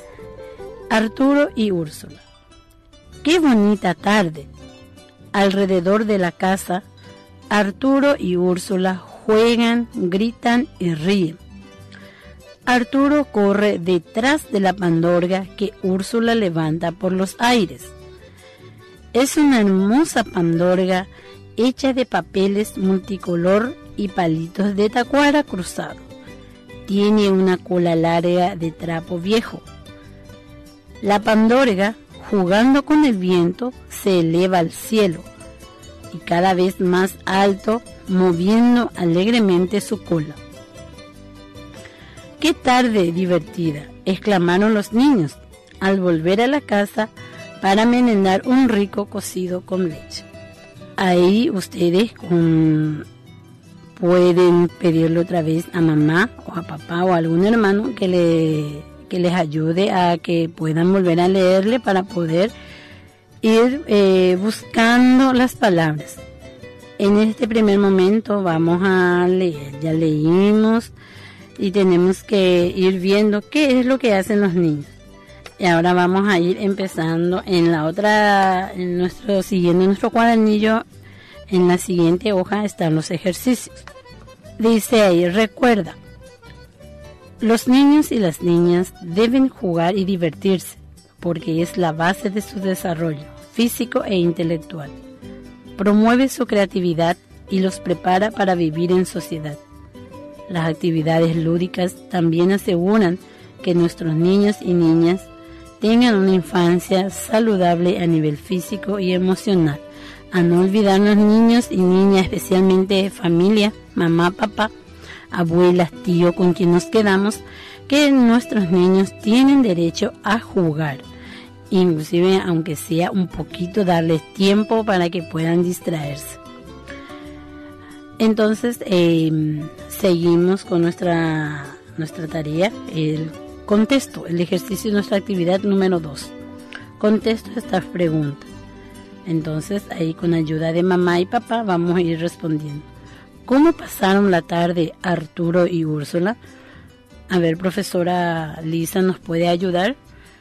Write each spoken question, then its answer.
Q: ¿Cómo pasaron la tarde Arturo y Úrsula?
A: Pasaron una tarde divertida.